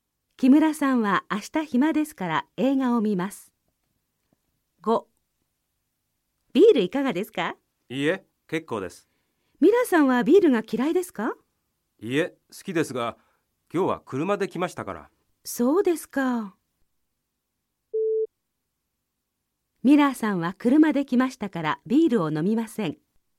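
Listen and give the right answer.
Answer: はい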